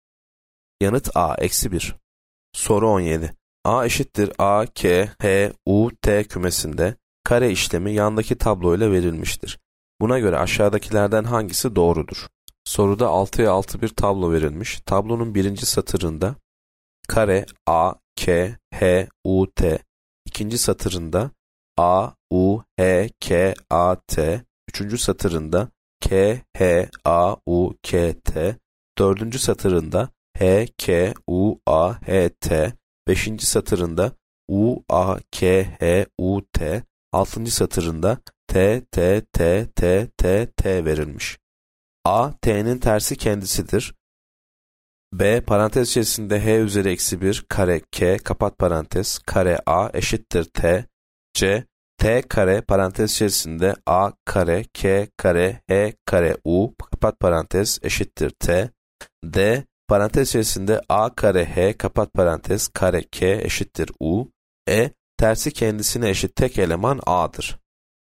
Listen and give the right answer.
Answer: Yanıt C. T kare parantez içerisinde A kare K kare H kare U kapat parantez eşittir T.